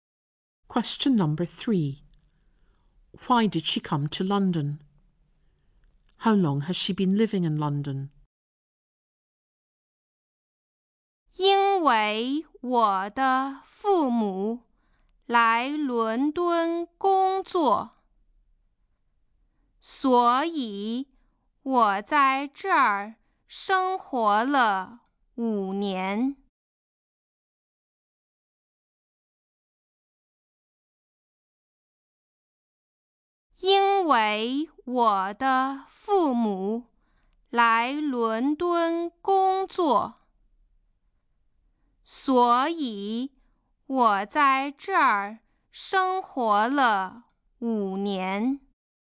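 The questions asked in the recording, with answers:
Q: Why did she come to London?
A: Her parents came to London to work

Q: How long has she been living in London?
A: 5 years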